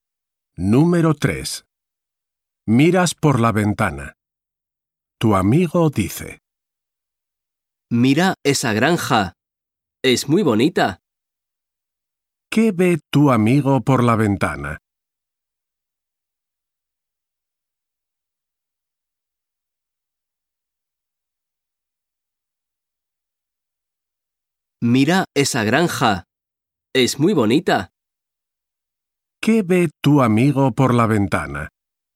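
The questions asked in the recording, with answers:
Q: ¿Qué ve tu amigo por la ventana?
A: Una granja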